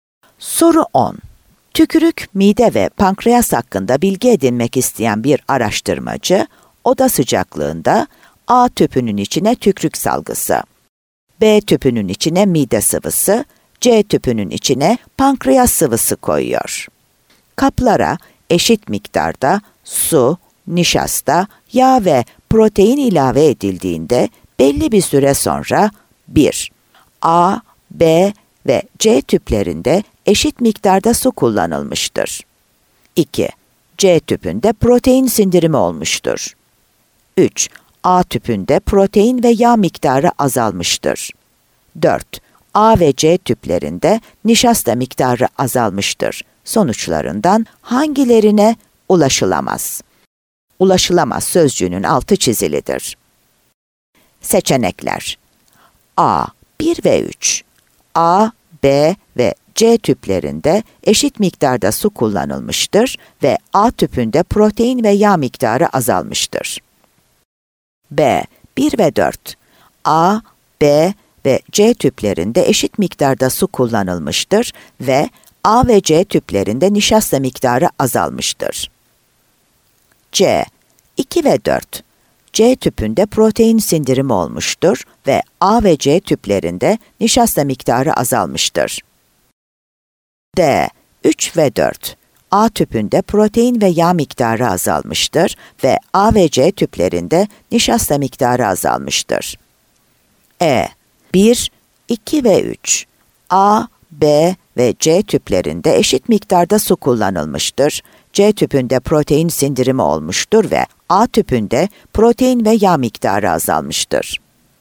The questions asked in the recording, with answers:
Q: Sonuçlarından hangilerine ulaşılamaz?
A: Adana